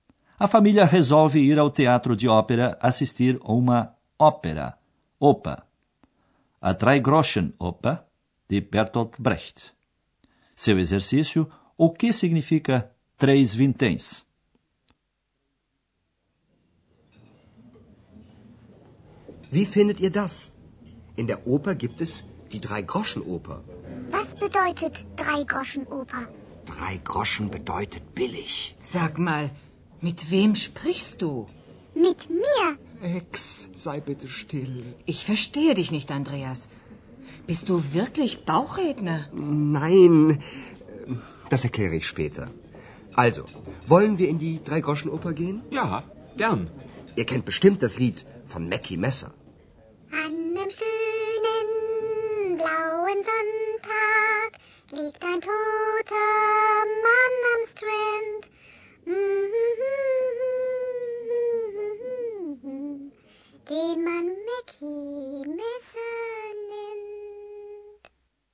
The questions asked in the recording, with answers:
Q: Seu exercício, o que significa três vinténs?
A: Por isso, três vinténs significa barato.